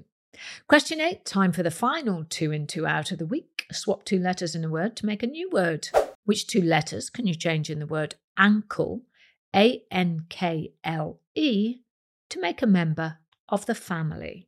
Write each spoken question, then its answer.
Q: Which two letters can you change in the word ankle, A N K L E, to make a member of the family?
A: Well, if you change the A to a U and the K to a C, you get your uncle.